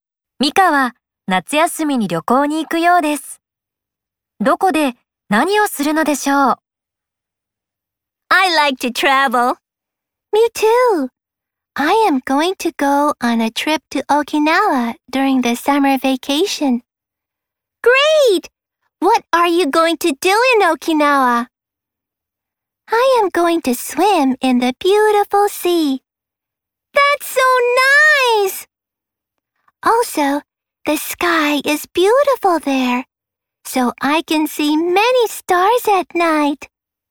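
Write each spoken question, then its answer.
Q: ミカは夏休みに旅行に行くようですどこで何をするのでしょ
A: 沖縄で美しい海で泳ぐ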